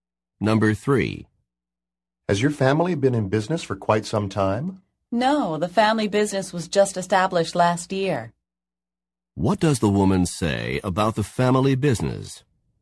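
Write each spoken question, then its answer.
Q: What does the woman say about the family business?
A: It was only started last year.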